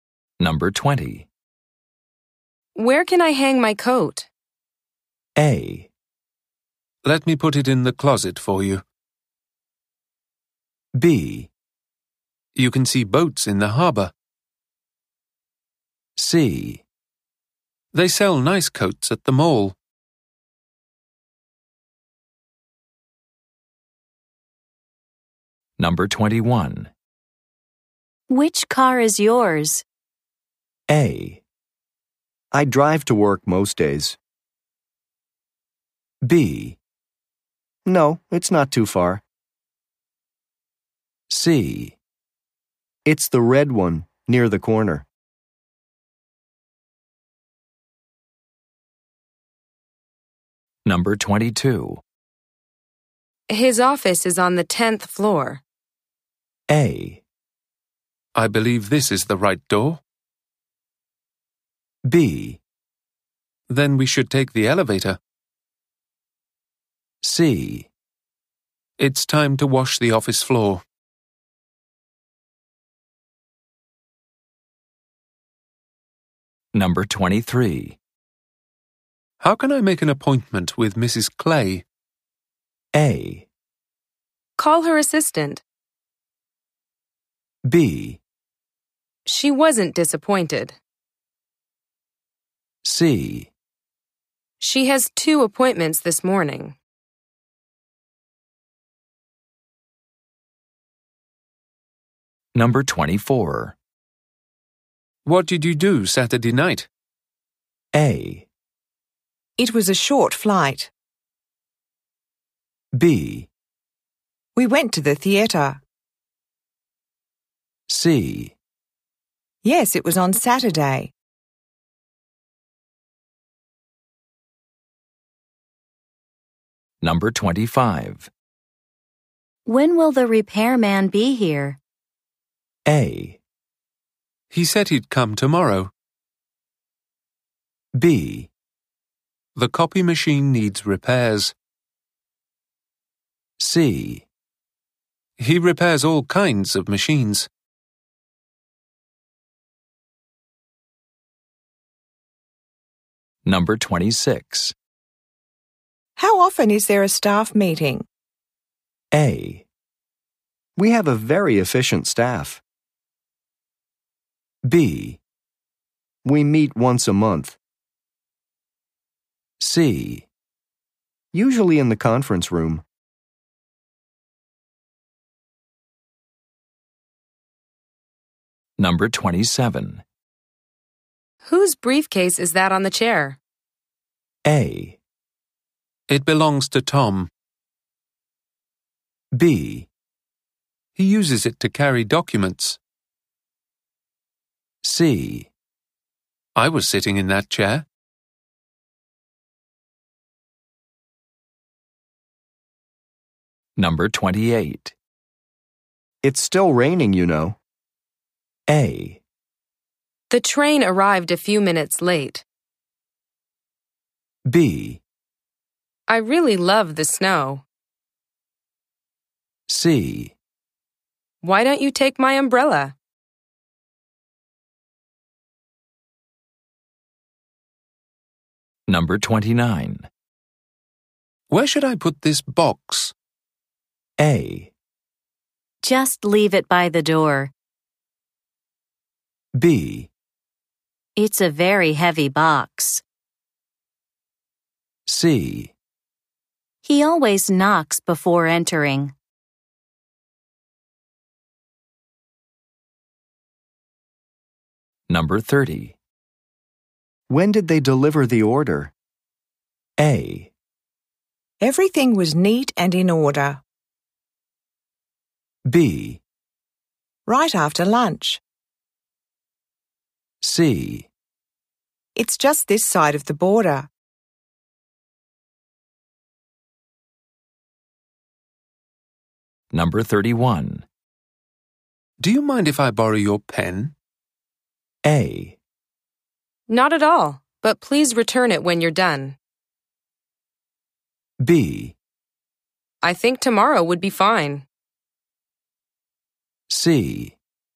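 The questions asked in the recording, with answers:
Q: Where can I hang my coat?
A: A: Let me put it in the closet for you.

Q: Which car is yours?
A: C: It's the red one near the corner.

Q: His office is on the 10th floor.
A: B: Then we should take the elevator.

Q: appointment with Mrs. Clay?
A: A: Call her assistant.

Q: What did you do Saturday night?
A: B: We went to the theatre.

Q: When will the repairman be here?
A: A: He said he'd come tomorrow.

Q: How often is there a staff meeting?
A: B: We meet once a month.

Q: Whose briefcase is that on the chair?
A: A: It belongs to Tom.

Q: It's still raining, you know.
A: C: Why don't you take my umbrella?

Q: Where should I put this box?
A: A: Just leave it by the door.

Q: 30. When did they deliver the order?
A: B: Right after lunch.

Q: Do you mind if I borrow your pen?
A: A: Not at all, but please return it when you're done.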